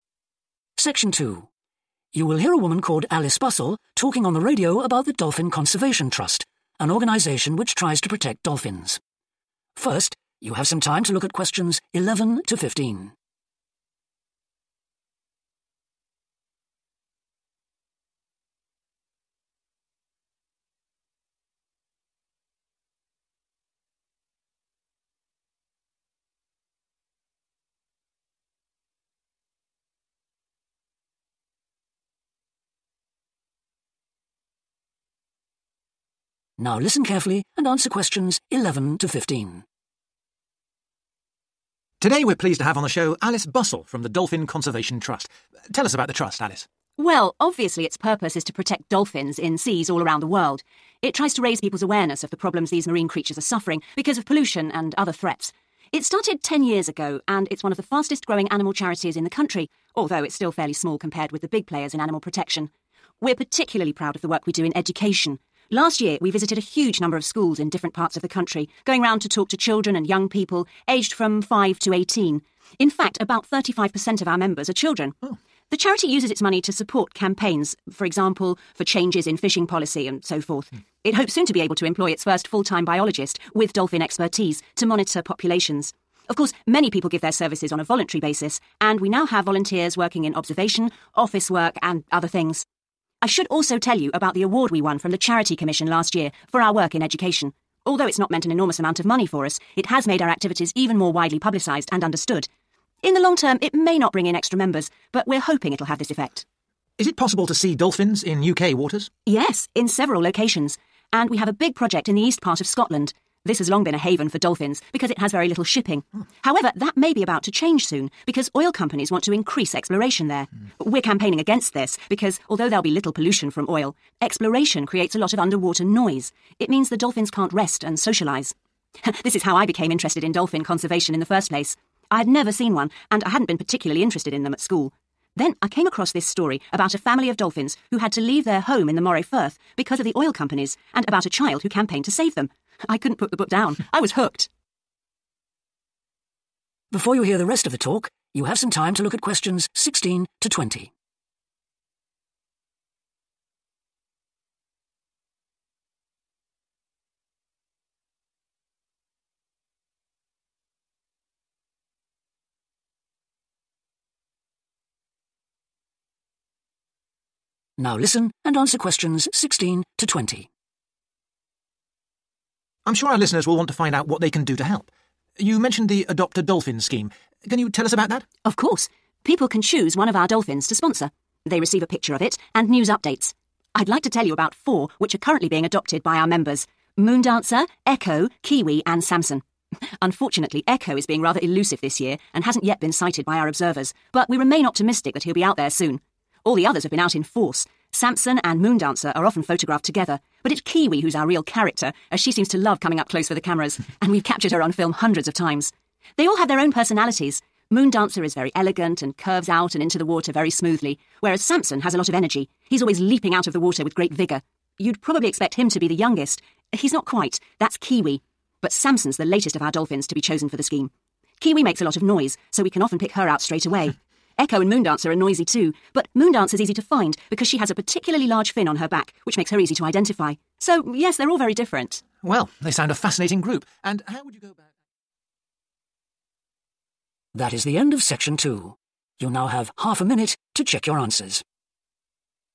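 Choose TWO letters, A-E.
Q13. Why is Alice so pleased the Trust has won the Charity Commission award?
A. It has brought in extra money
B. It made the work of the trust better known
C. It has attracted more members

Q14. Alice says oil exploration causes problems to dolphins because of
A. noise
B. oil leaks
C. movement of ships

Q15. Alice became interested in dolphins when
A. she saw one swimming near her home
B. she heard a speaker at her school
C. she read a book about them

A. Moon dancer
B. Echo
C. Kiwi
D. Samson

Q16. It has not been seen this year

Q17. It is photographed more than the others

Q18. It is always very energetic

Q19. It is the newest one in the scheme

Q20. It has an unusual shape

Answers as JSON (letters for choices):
{"13": "B", "14": "A", "15": "C", "16": "B", "17": "C", "18": "D", "19": "D", "20": "A"}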